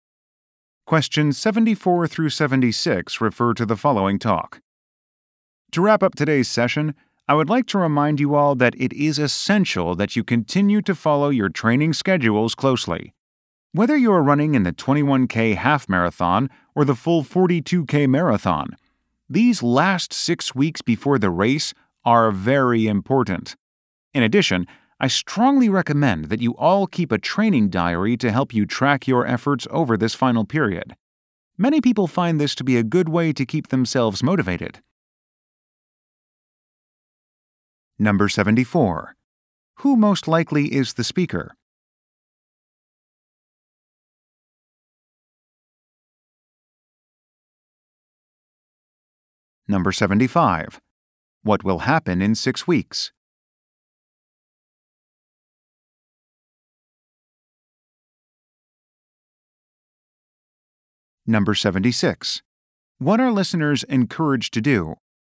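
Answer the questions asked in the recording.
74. A running coach
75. A marathon race
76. Keep a training diary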